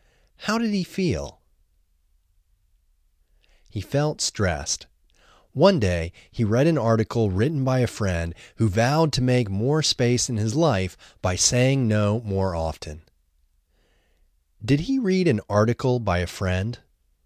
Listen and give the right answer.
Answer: Yes, he read an article by a friend.